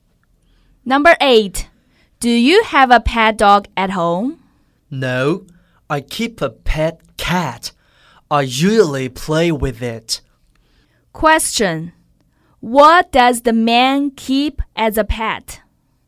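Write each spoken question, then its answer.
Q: What does the man keep as a pet?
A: A pet cat.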